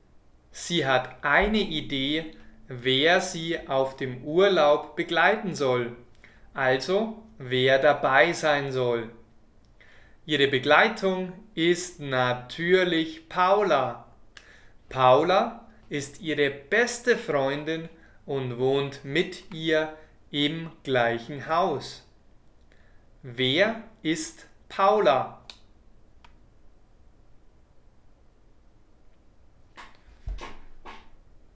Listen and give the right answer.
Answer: Paula ist ihre beste Freundin.